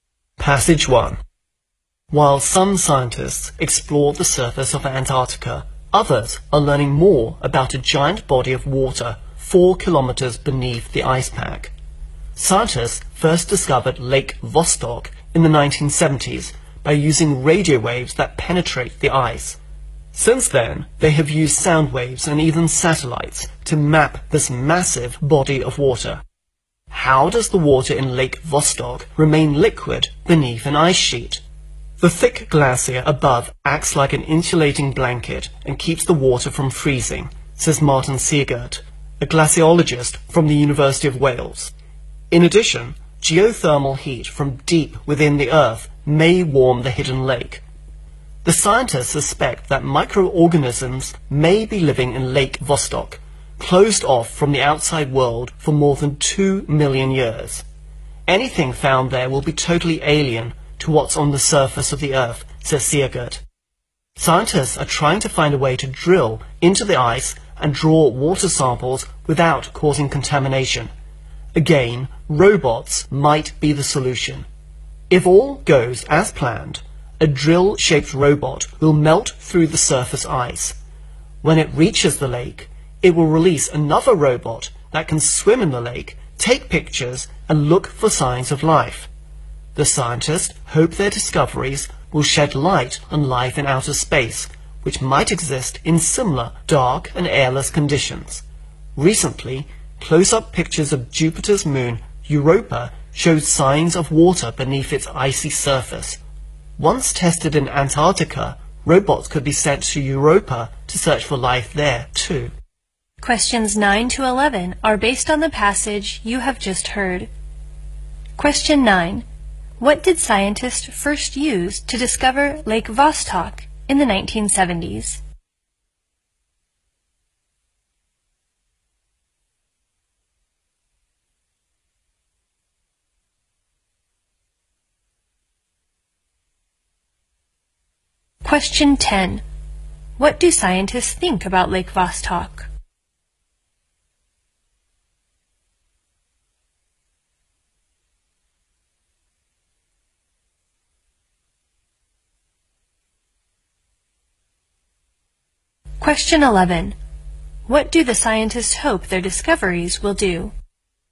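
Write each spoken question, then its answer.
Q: What did scientists first use to discover Lake Vostok in the 1970s?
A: Radio waves

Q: What do the scientists hope their discoveries will do?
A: Shed light on life in outer space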